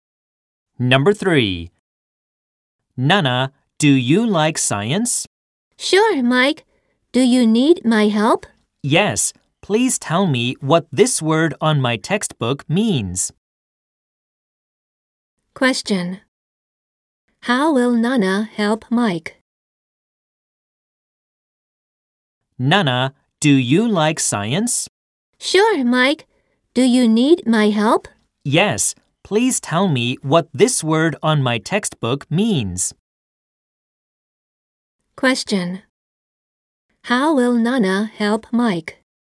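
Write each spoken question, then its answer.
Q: How will Nana help Mike?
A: She will tell him what a word in his science textbook means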